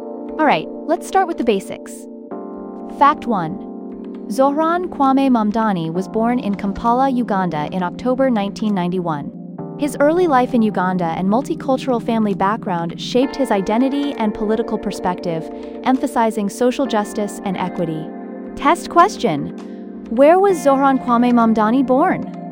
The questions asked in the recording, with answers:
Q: Where was Zohran Kwame Mamdani born?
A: Correct answer, Kampala, Uganda.